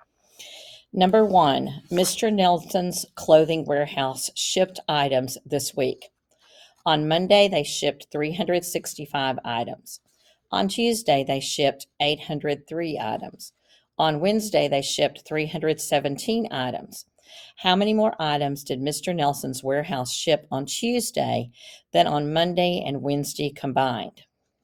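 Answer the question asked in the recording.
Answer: 121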